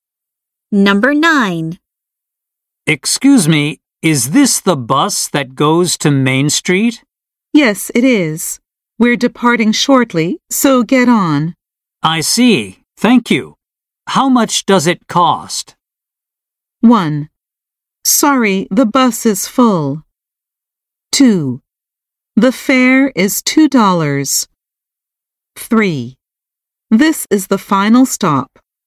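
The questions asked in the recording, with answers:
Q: I see. Thank you. How much does it cost?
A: 2: The fare is $2.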